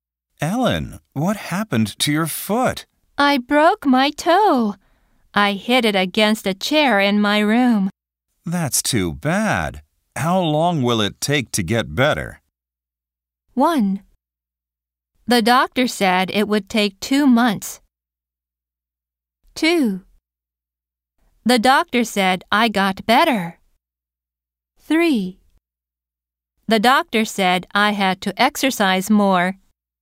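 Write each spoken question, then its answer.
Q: How long will it take to get better?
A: 1: The doctor said it would take 2 months.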